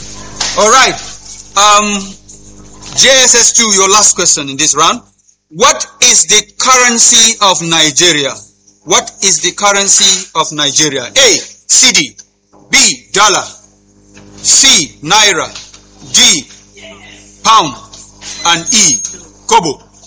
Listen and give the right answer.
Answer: Naira.